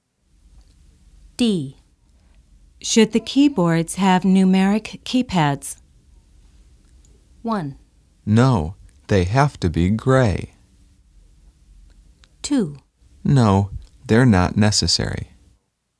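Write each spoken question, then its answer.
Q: Should the keyboards have numeric keypads?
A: 2: No, they're not necessary.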